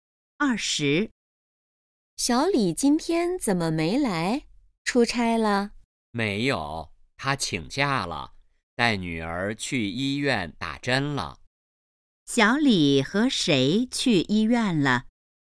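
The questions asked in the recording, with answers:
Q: 小李和谁去医院了?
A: 女儿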